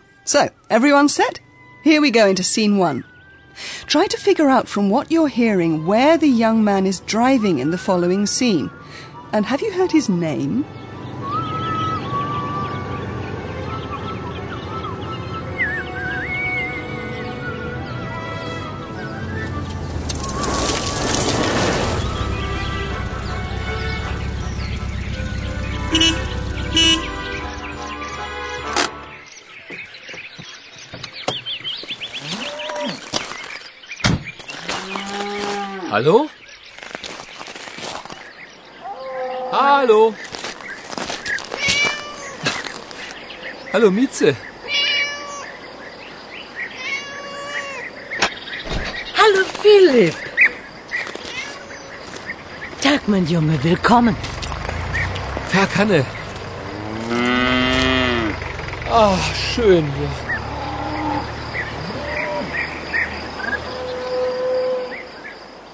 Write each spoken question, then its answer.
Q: And have you heard his name?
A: Maybe you've also gathered that the young man is called Philip